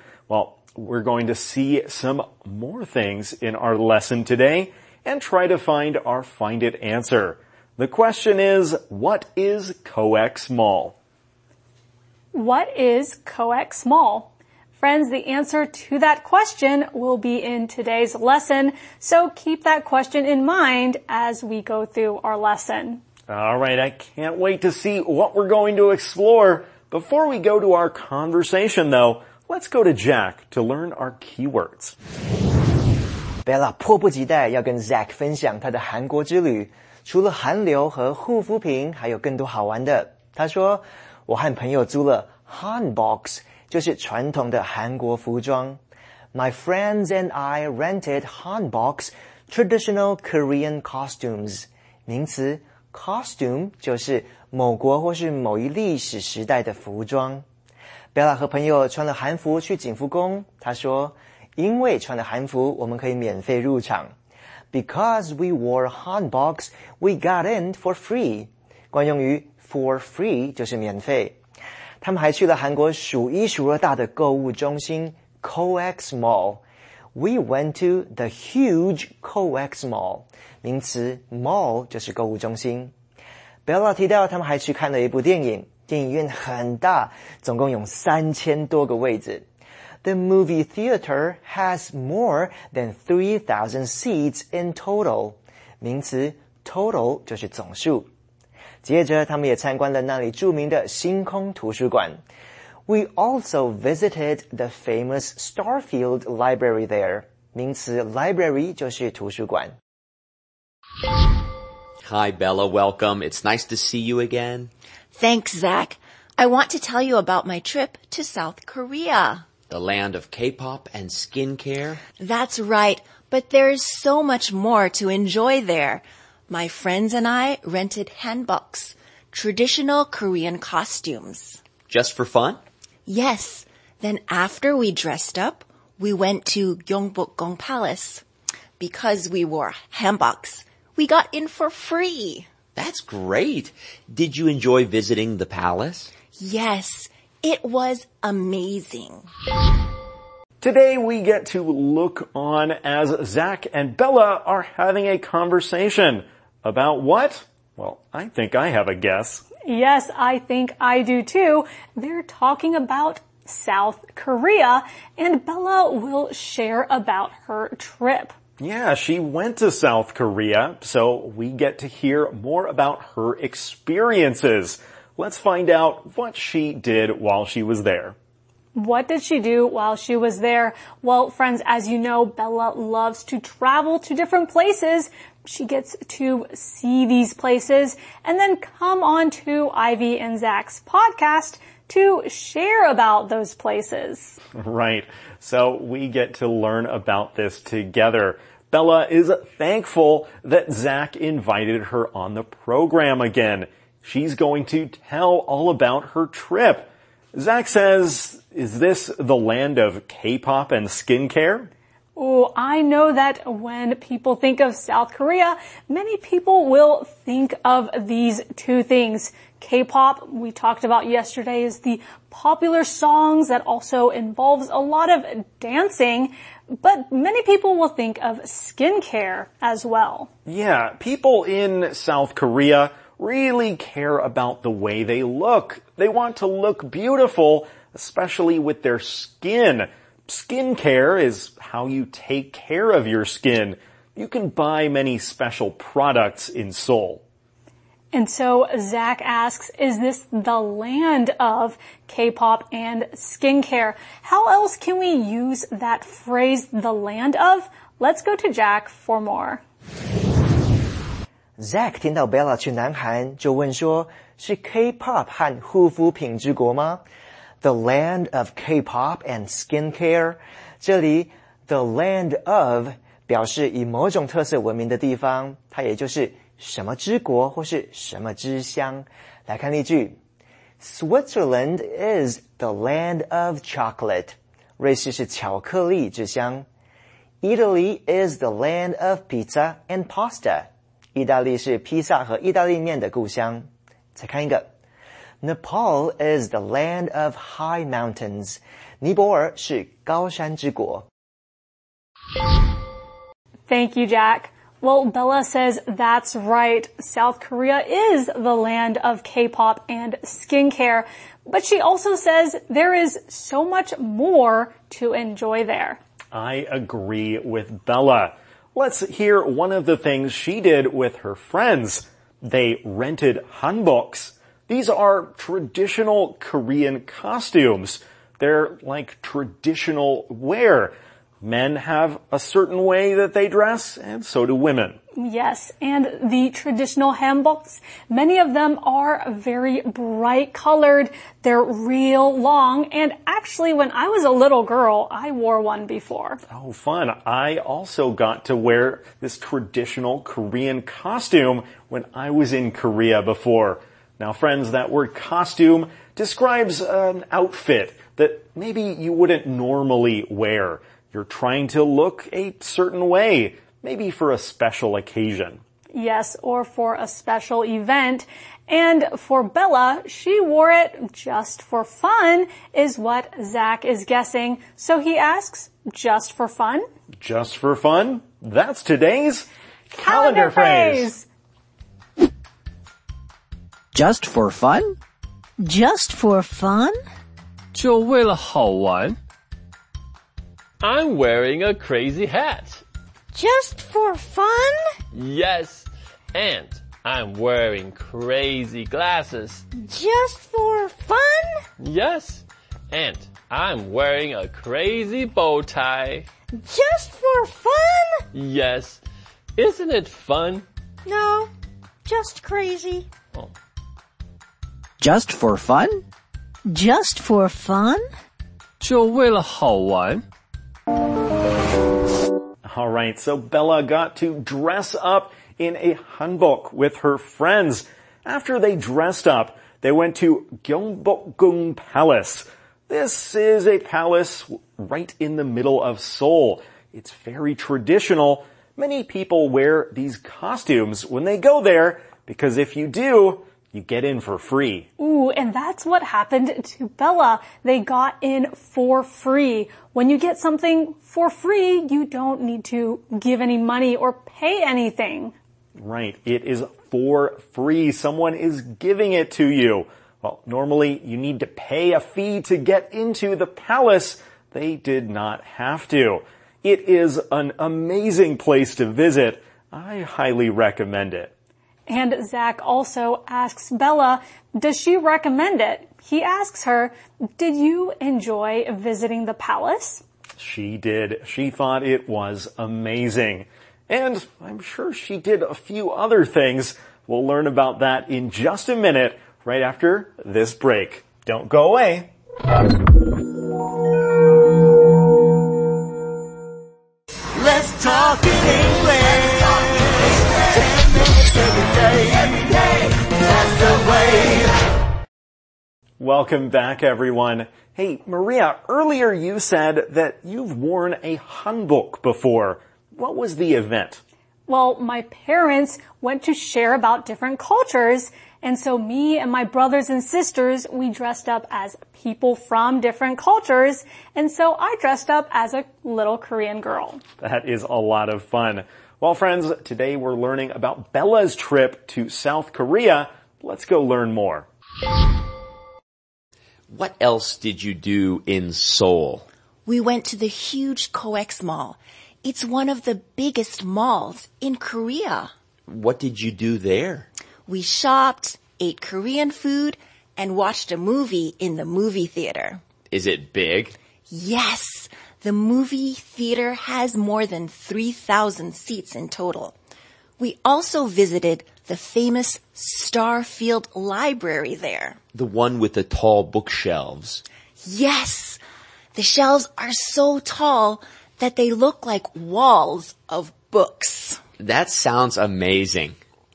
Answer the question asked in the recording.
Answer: It's one of the biggest malls in Korea, and that's where Bella went to.